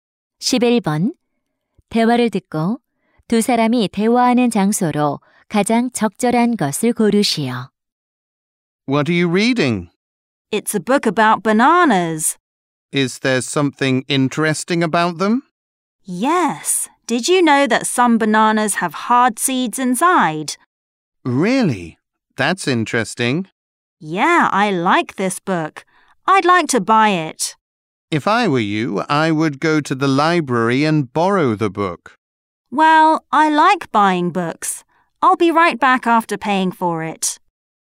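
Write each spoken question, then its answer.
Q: 대화를 듣고 두 사람이 대화하는 장소로 가장 적절한 것을 고르시오.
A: 서점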